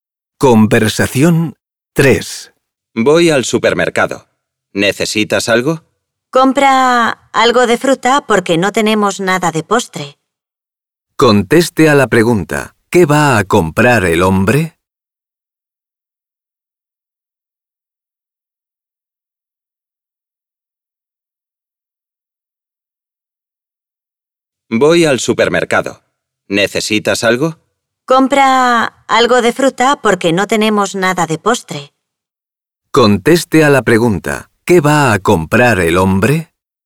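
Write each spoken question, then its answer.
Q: ¿Qué va a comprar el hombre?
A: Fruta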